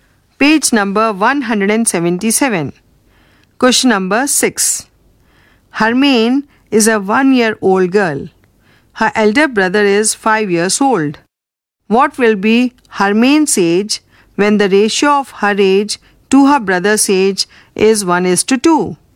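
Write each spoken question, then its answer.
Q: What will be Hermaine's age when the ratio of her age to her brother's age is 1:2?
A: 4 years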